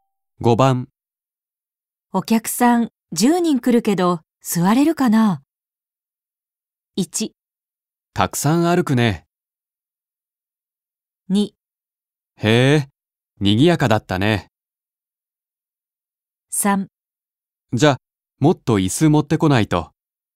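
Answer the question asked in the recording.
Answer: 3: じゃ、もっと椅子持ってこないと。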